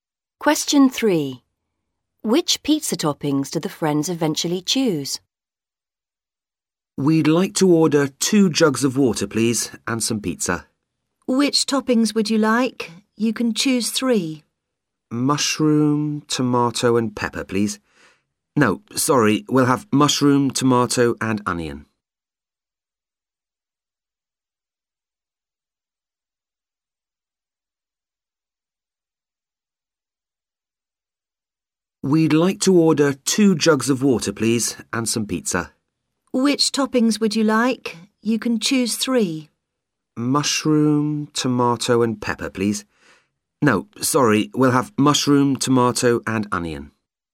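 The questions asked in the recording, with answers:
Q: Which pizza toppings do the friends eventually choose?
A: Mushroom, tomato and onion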